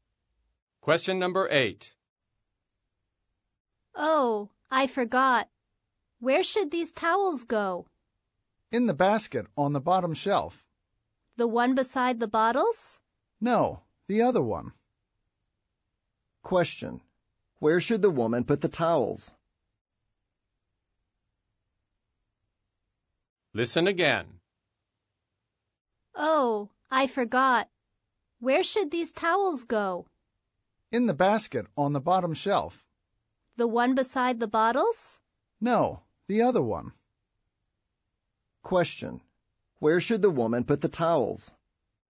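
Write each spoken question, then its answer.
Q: Where should the woman put the towels?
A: In the basket on the bottom shelf that is not beside the bottles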